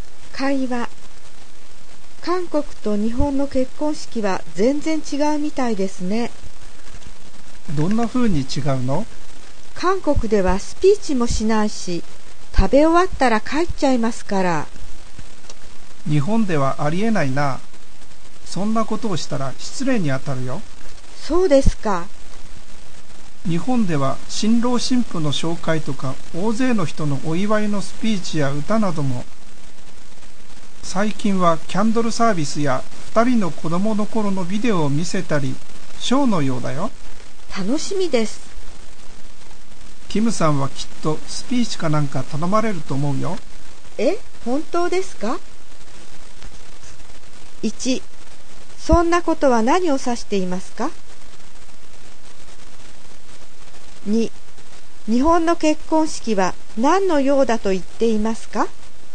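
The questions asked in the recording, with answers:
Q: そんなことは何を指していますか?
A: スピーチもしないで、食べ終わったら帰ってしまうこと

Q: 日本の結婚式は何のようだと言っていますか?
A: ショーのよう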